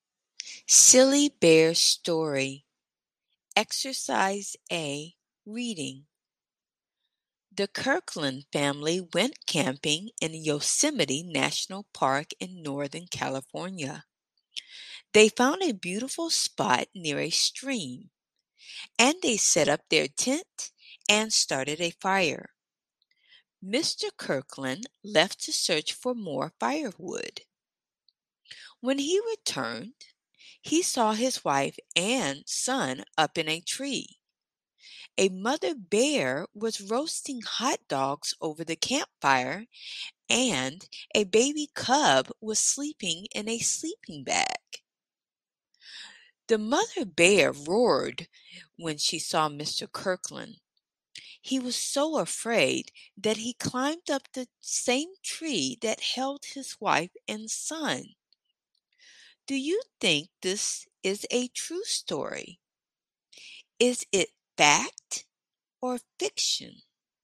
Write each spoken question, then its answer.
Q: Is it fact or fiction?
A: And this story is fiction.